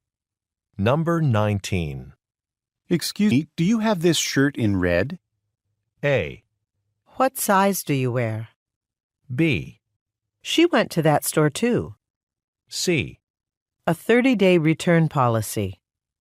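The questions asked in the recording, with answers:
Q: Excuse me, do you have this shirt in red?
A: A: What size do you wear?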